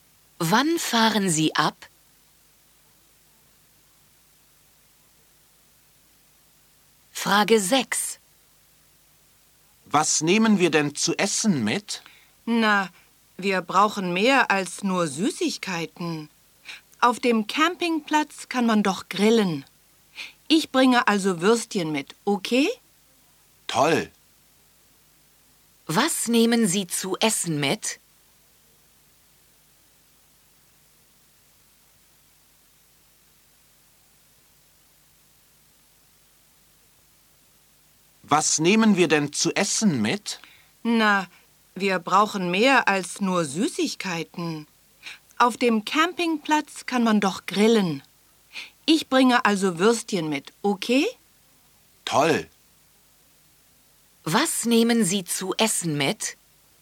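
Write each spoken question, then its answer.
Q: Was nehmen Sie zu essen mit?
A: Würstchen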